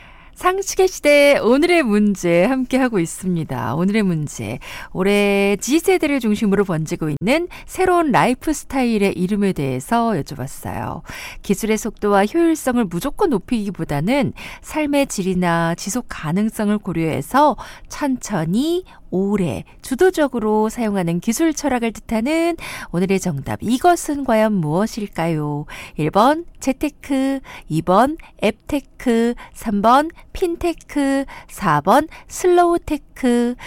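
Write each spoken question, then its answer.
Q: 기술의 속도와 효율성을 무조건 높이기보다는 삶의 질이나 지속 가능성을 고려해서 천천히 오래 주도적으로 사용하는 기술 철학을 뜻하는 오늘의 정답, 이것은 과연 무엇일까요?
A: 4번: 슬로우테크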